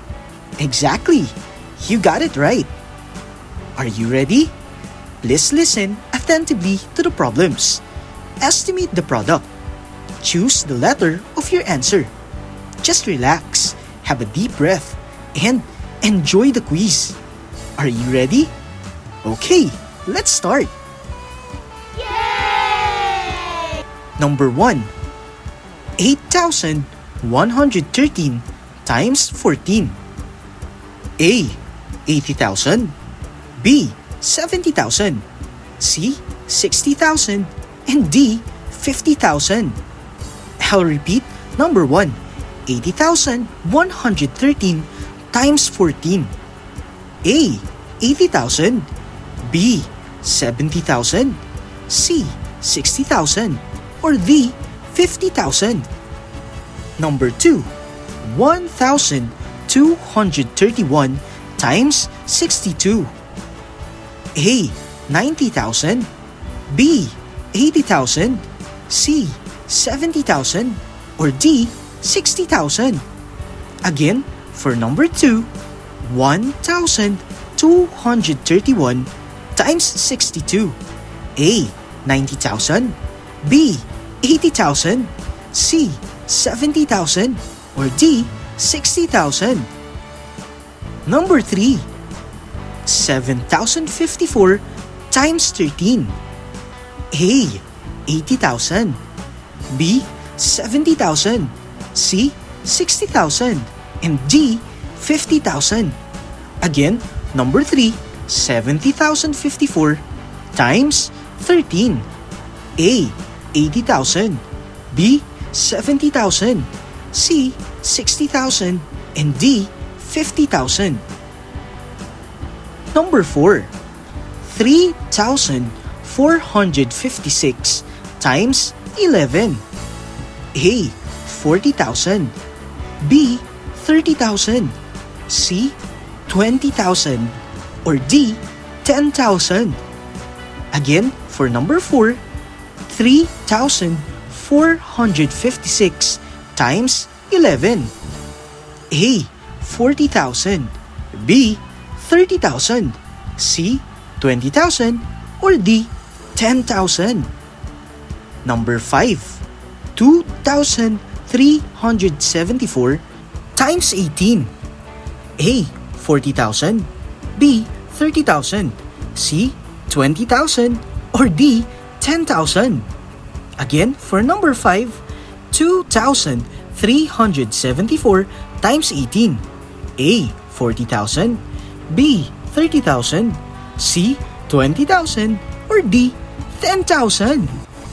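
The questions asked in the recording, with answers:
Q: 8,113 times 14.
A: A: 80,000

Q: 1,231 times 62.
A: D: 60,000

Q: 7,054 times 13.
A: B: 70,000

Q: 3,456 times 11.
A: B: 30,000

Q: 2,374 times 18.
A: A: 40,000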